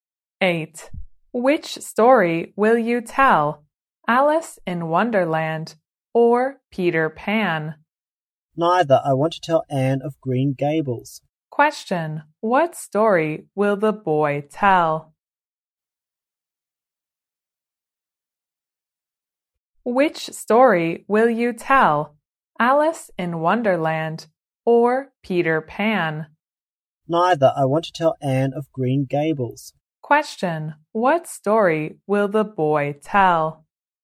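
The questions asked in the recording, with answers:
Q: what story will the boy tell?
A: Anne of Green Gables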